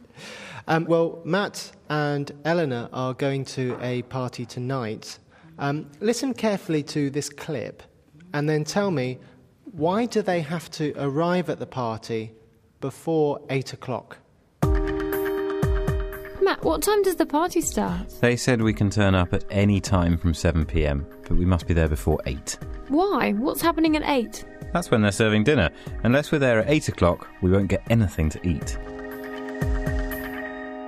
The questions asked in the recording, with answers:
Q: why do they have to arrive at the party before 8 o'clock?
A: Maybe they will have nothing to eat after 8 o'clock.